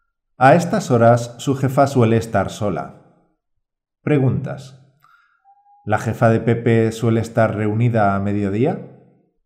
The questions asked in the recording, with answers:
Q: ¿La jefa de Pepe suele estar reunida a mediodía?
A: No, a mediodía suele estar trabajando sola en su despacho, por tanto es un buen momento para hablar con su jefa.